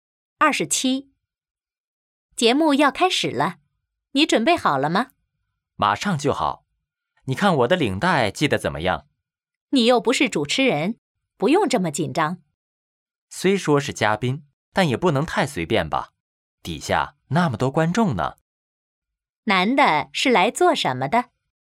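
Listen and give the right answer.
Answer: 做节目嘉宾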